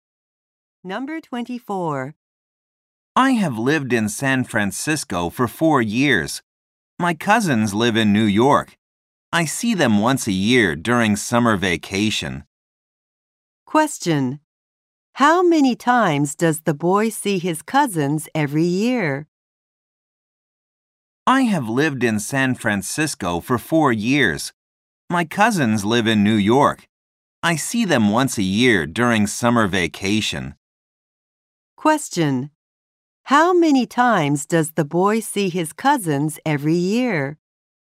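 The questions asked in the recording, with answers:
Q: How many times does the boy see his cousins every year?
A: Once a year.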